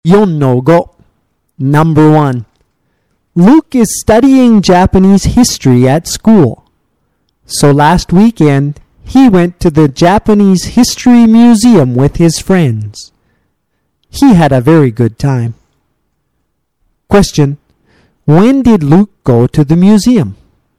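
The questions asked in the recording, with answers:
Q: When did Luke go to the museum?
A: Last weekend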